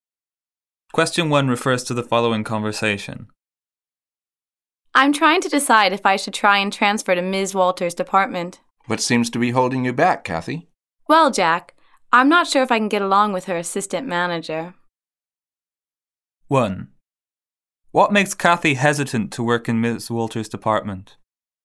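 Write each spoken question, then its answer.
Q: What makes Kathy hesitant to work in Ms. Walter's department?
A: She isn't sure she can get along with Ms. Walter's assistant manager.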